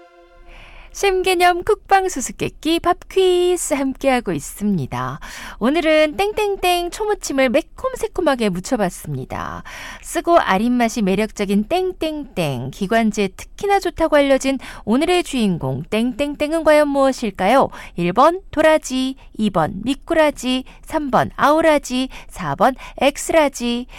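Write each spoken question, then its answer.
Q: 쓰고 아린맛이 매력적인 땡땡땡, 기관지에 특히나 좋다고 알려진 오늘의 주인공 땡땡땡은 과연 무엇일까요?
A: 1: 도라지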